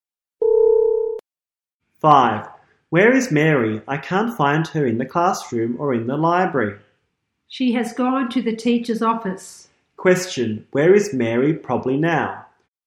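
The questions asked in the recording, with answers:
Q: Question, where is Mary probably now?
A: In the teacher's office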